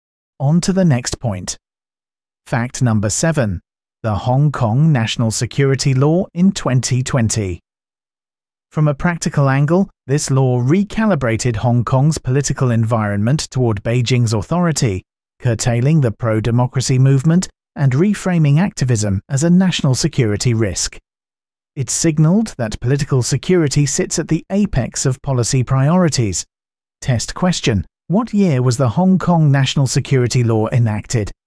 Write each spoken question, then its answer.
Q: What year was the Hong Kong National Security Law enacted?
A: Correct answer. 2020.